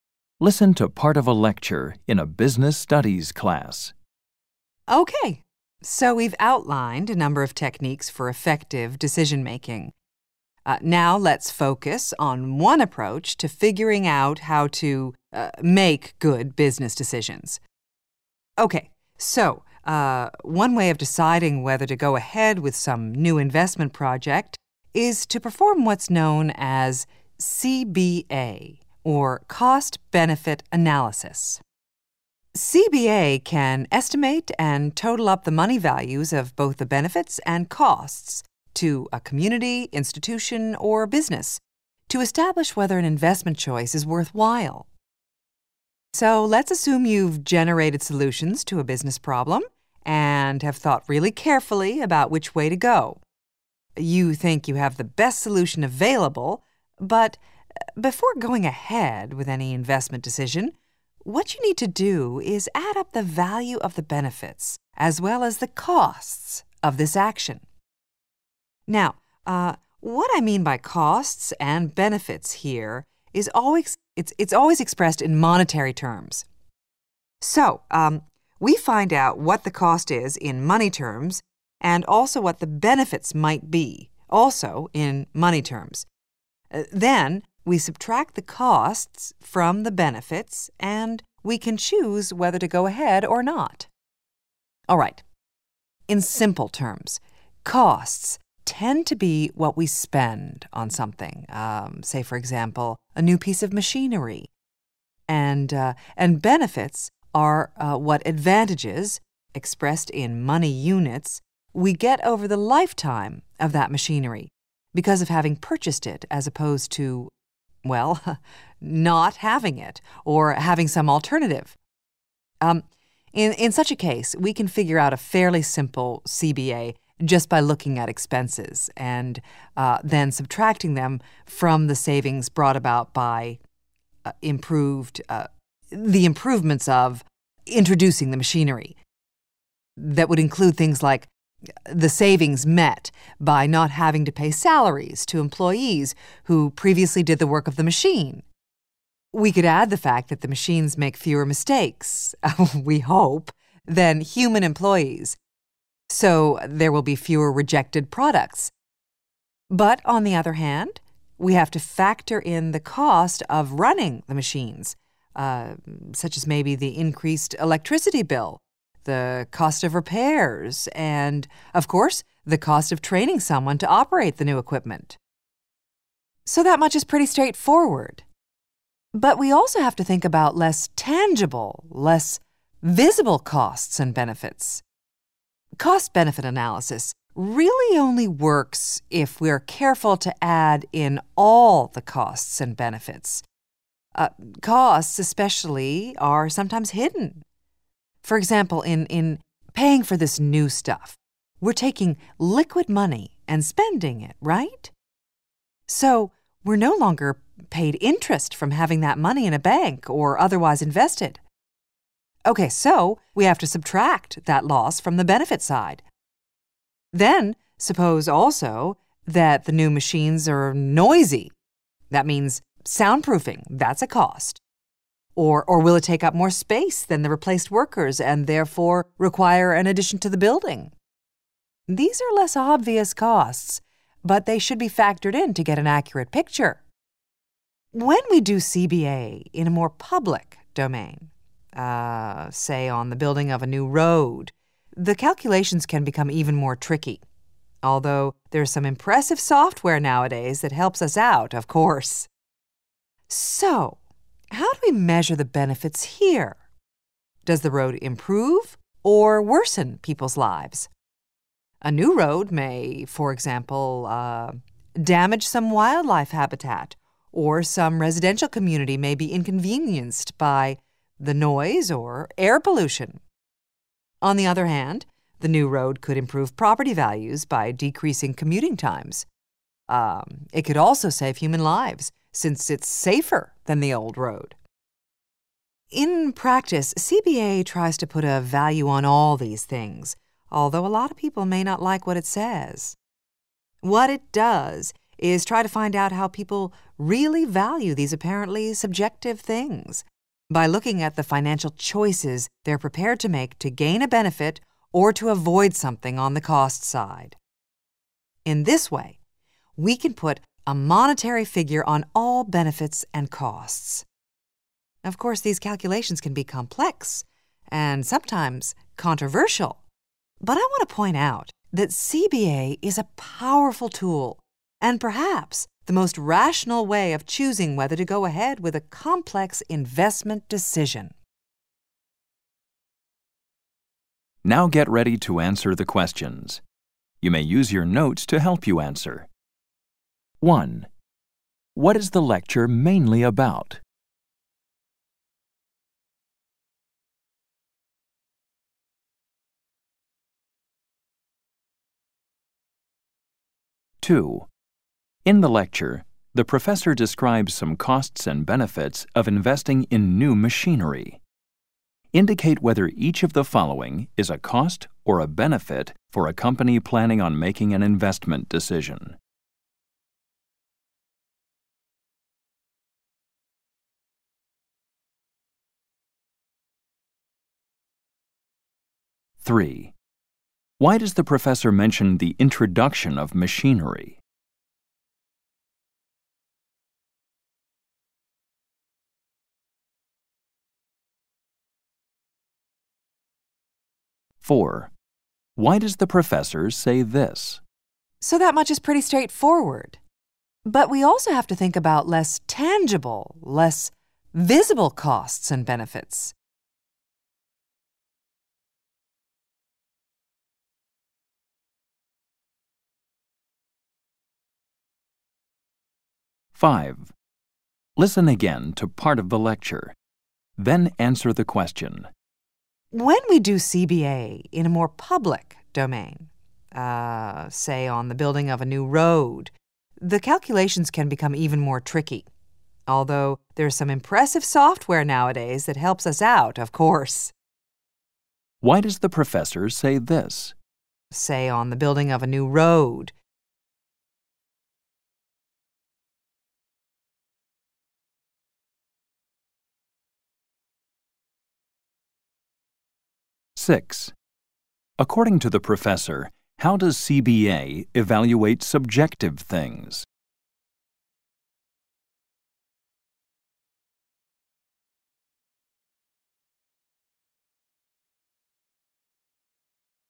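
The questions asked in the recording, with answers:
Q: What is the lecture mainly about?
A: Cost-benefit analysis (CBA) as a way to decide whether to go ahead with an investment

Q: Why does the professor mention the introduction of machinery?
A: To give an example of a fairly simple cost-benefit analysis

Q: According to the professor, how does CBA evaluate subjective things?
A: By looking at the financial choices people are prepared to make to gain a benefit or avoid a cost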